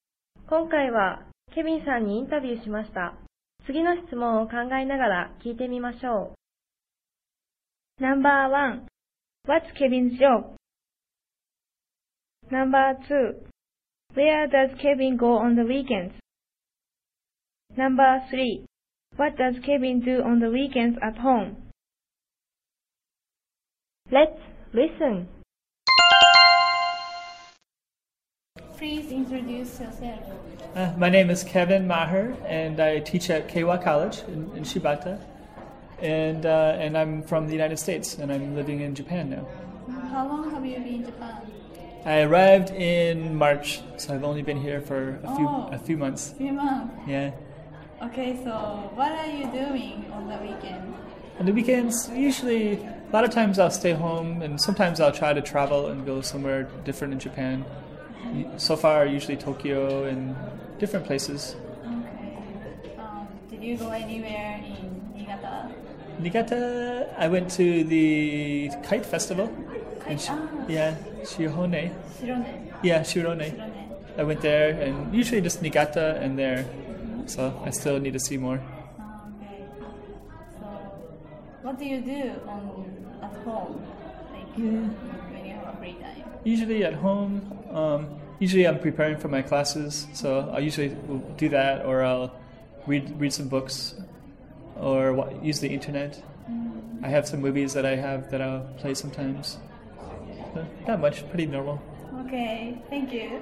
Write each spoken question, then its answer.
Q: What's Kevin's job?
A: He teaches at Keiwa College in Shibata.

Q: Where does Kevin go on the weekends?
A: He usually travels to Tokyo and different places.

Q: What does Kevin do on the weekends at home?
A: He usually prepares for his classes, reads some books, and uses the internet.